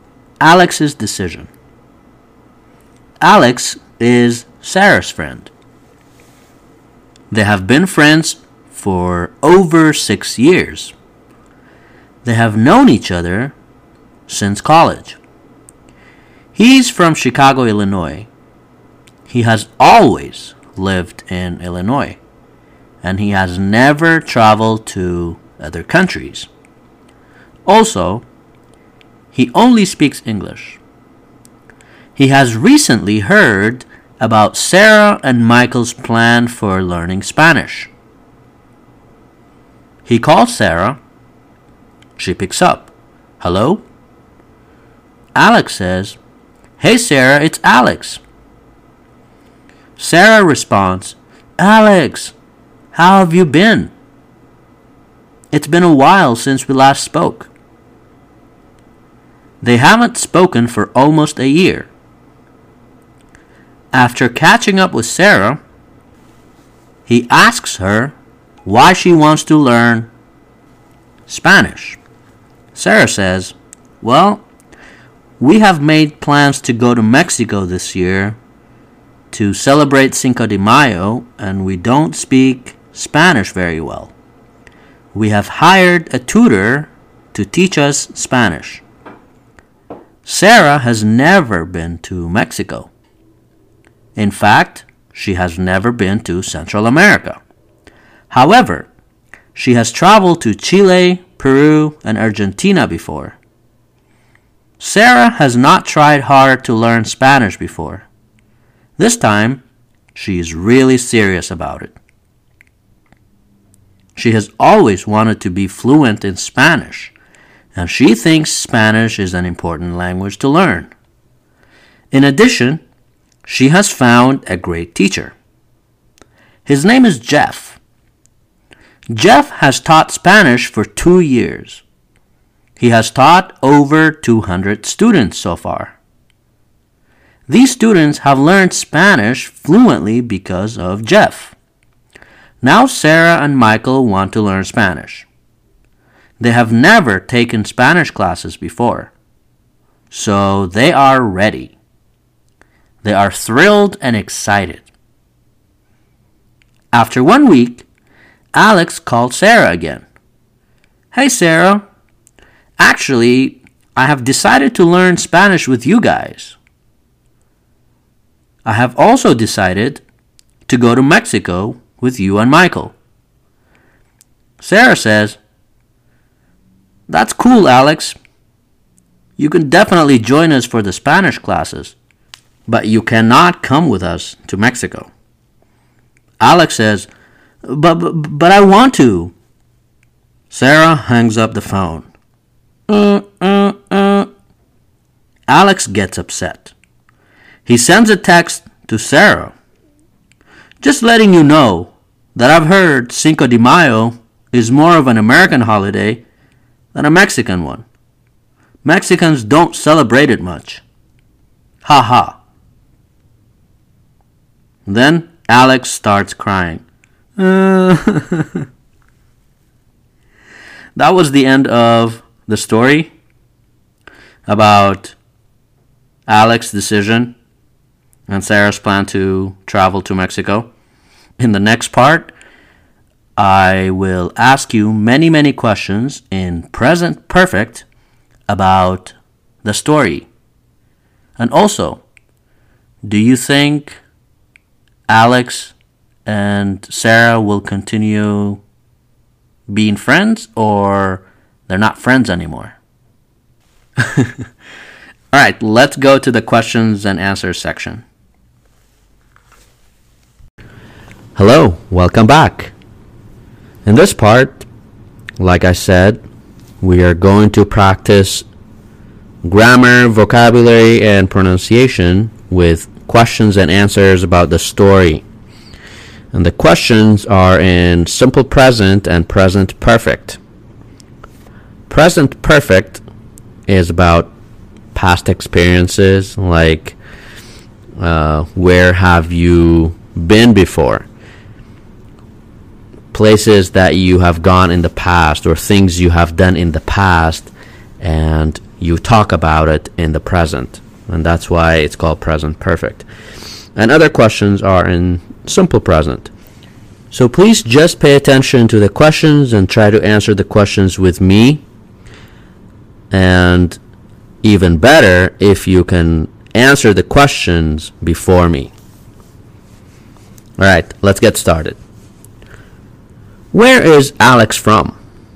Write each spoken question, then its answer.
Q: Where is Alex from?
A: He is from Illinois.